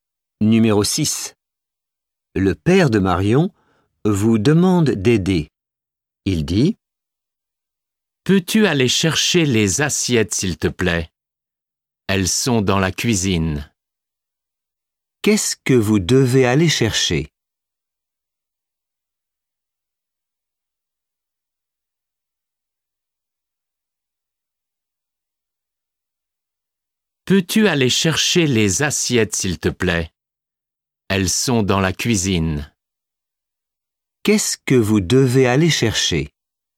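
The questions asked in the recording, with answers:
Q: Qu'est-ce que vous devez aller chercher ?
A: Les assiettes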